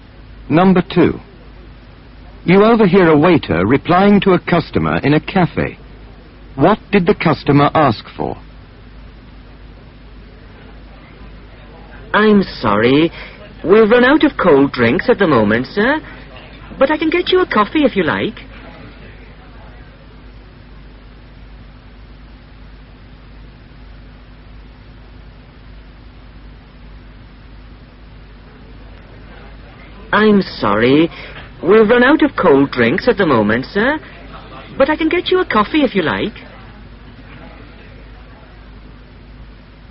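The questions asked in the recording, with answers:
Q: What did the customer ask for?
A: A cold drink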